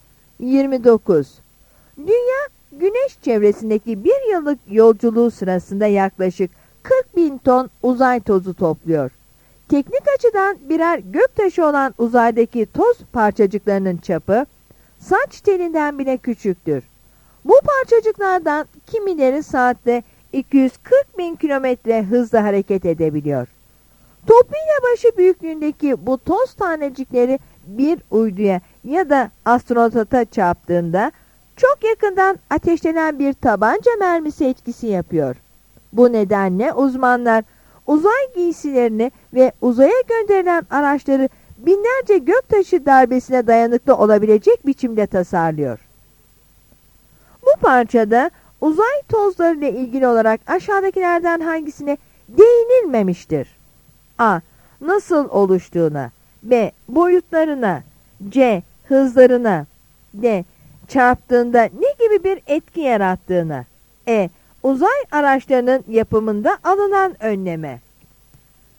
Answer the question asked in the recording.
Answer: Yanıt A'dır.